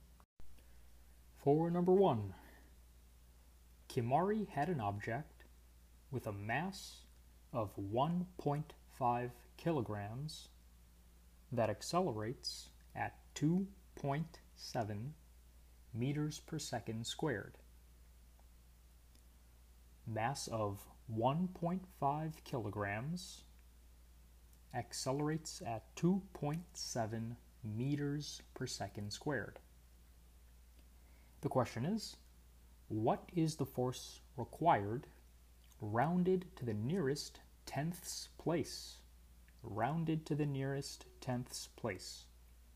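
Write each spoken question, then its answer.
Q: what is the force required rounded to the nearest tenths place?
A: 4.1 N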